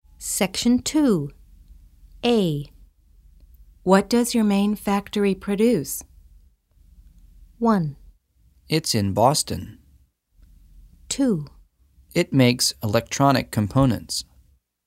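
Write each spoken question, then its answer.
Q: What does your main factory produce?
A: 2: It makes electronic components.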